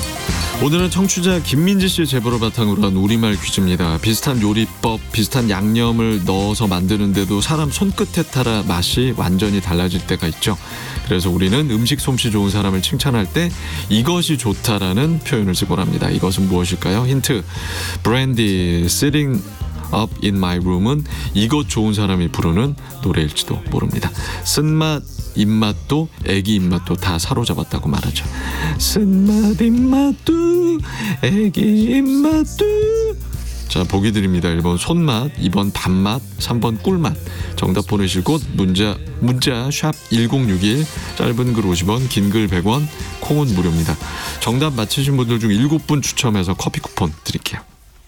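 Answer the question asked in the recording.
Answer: 1: 손맛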